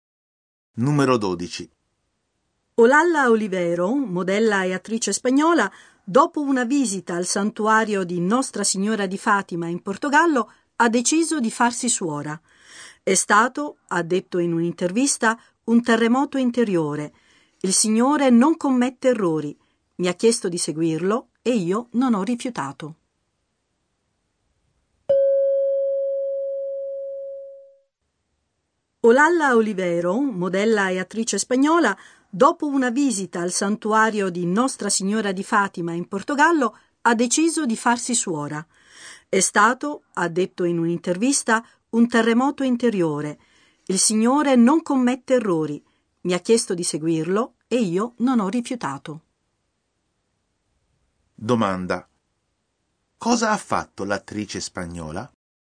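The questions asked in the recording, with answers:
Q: cosa ha fatto l'attrice spagnola?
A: Ha deciso di farsi suora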